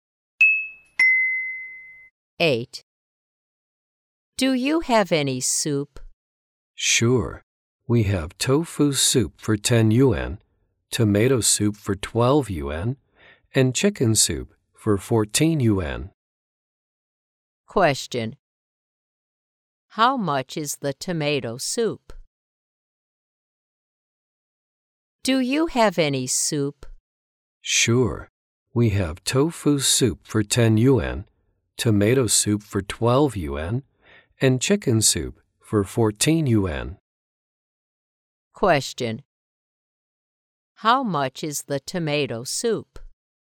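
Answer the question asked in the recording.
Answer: 12 yuan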